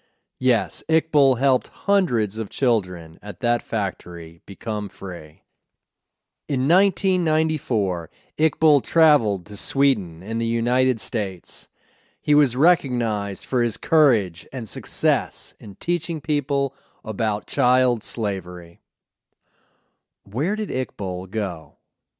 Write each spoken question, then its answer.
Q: Where did Iqbal go?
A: He went to Sweden and the United States.